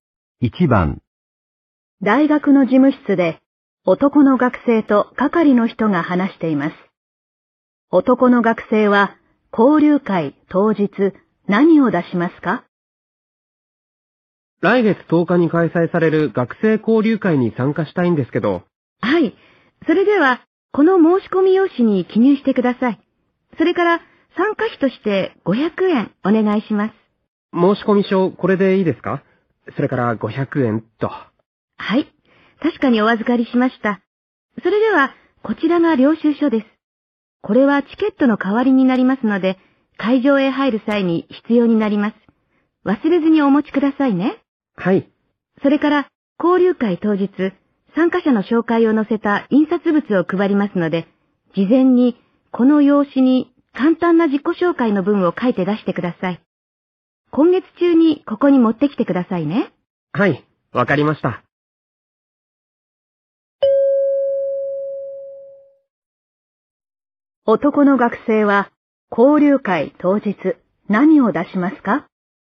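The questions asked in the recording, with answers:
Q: 男の学生は交流会当日何を出しますか?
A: 領収書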